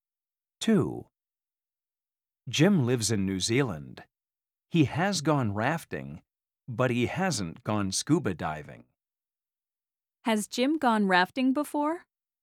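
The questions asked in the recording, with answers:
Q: Has Jim gone rafting before?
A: Yes, he has.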